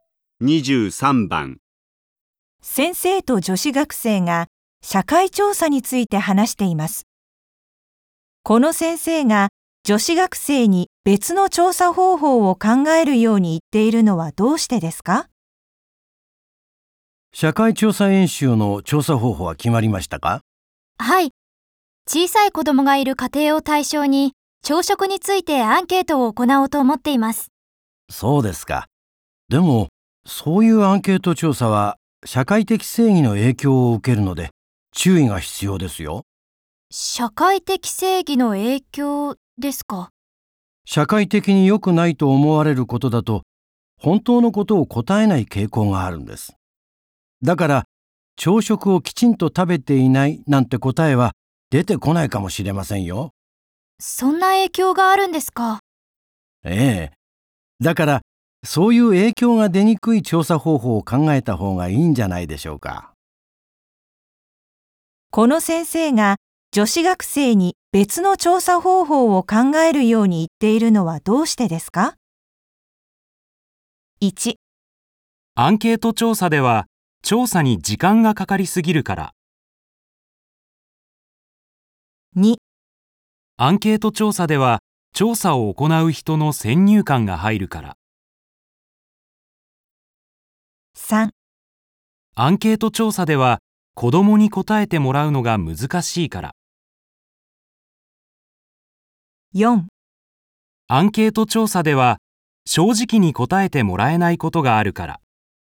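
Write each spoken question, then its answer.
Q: この先生が女子学生に別の調査方法を考えるように言っているのはどうしてですか?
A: 4: アンケート調査では正直に答えてもらえないことがあるから。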